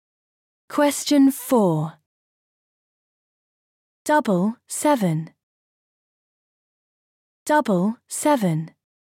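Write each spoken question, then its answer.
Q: Double 7.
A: 14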